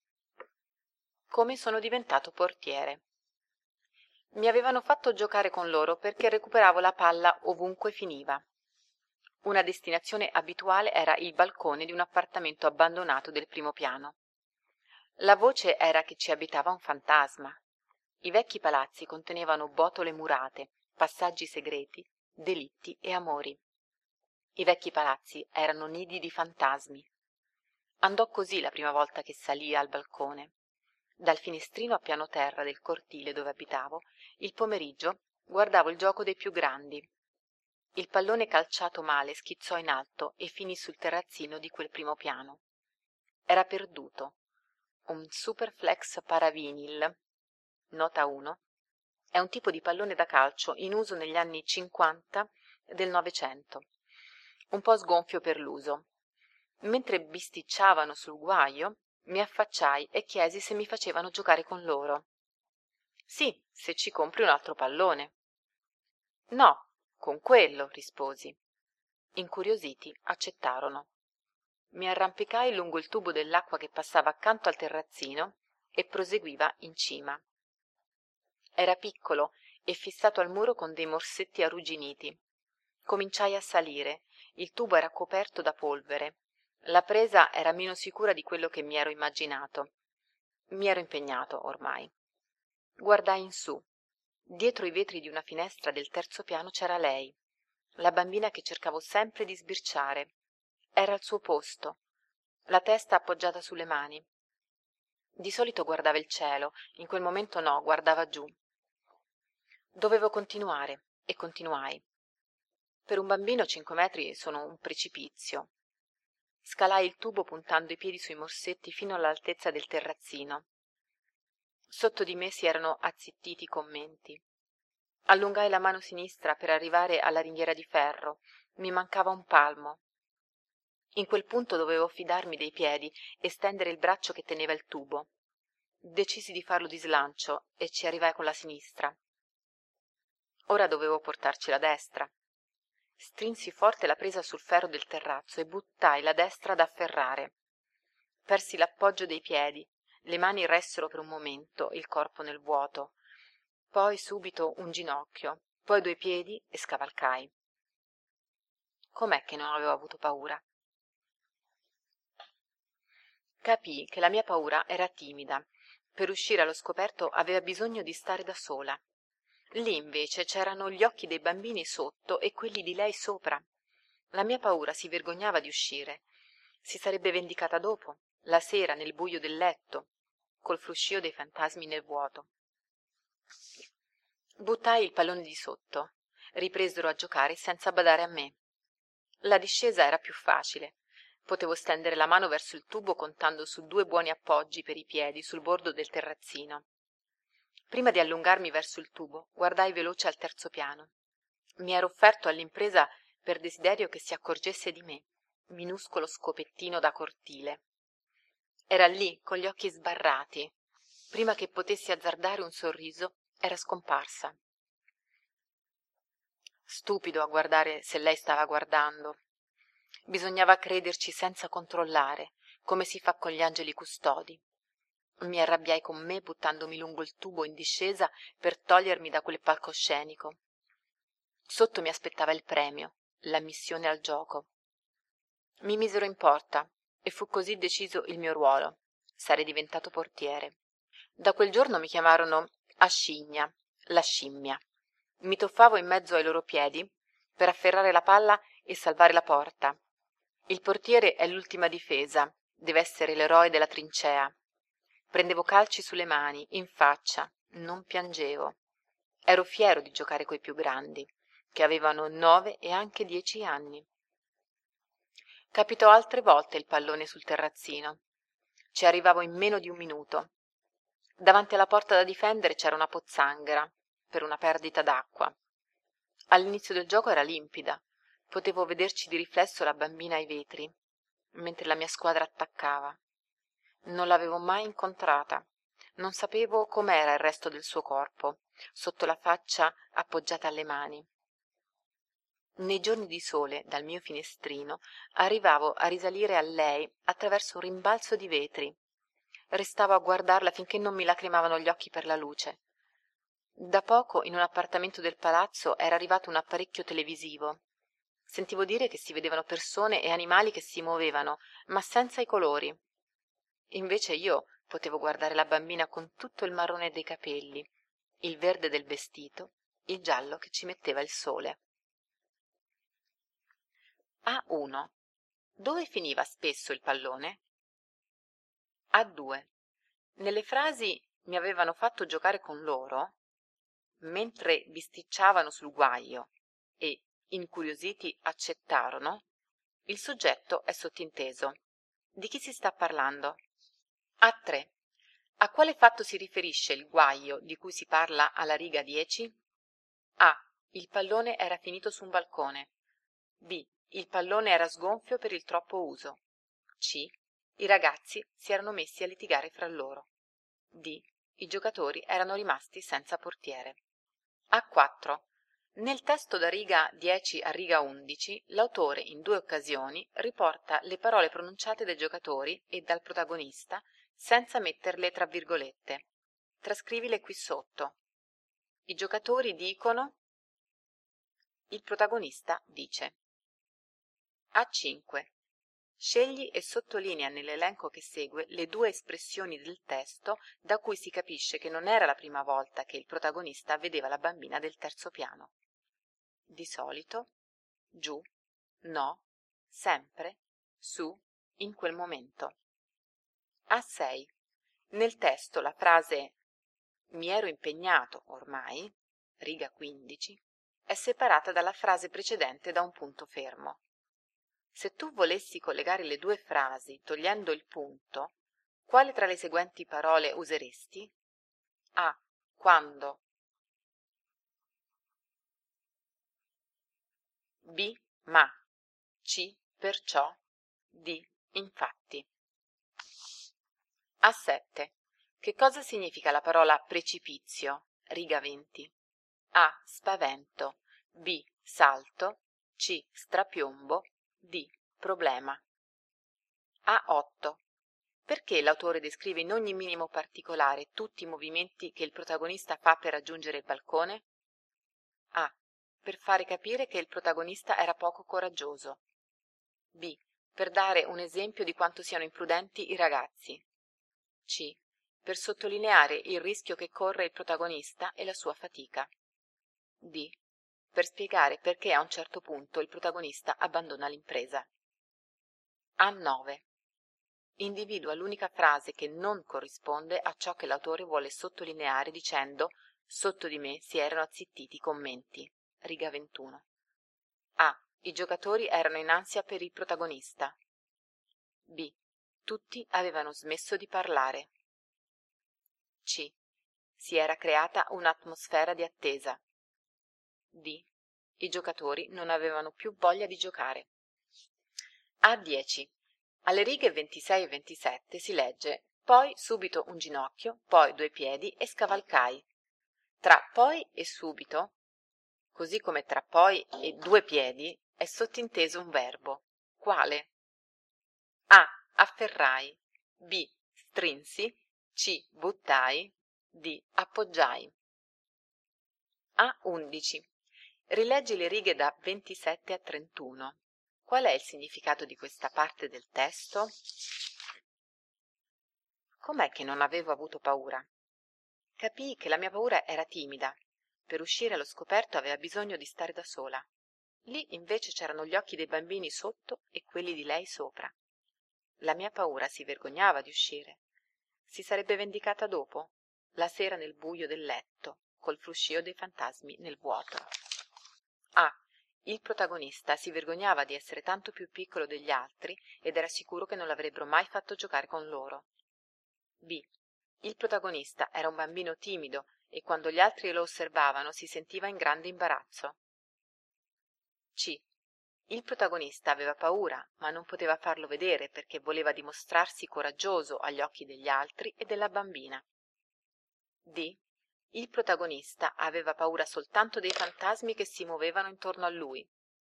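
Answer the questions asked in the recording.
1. Sul balcone di un appartamento abbandonato del primo piano
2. A: Il pallone era finito su un balcone.
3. C: Strapiombo.
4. C: Per sottolineare il rischio che corre il protagonista e la sua fatica.
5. D: I giocatori non avevano più voglia di giocare.
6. D: Appoggiai.
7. C: Il protagonista aveva paura, ma non poteva farlo vedere perché voleva dimostrarsi coraggioso agli occhi degli altri e della bambina.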